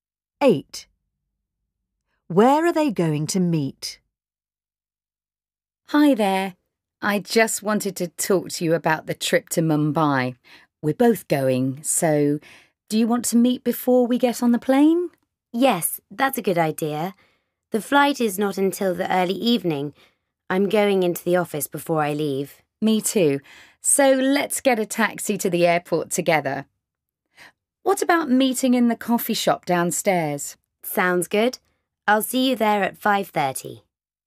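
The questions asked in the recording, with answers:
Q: Where are they going to meet?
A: In the coffee shop downstairs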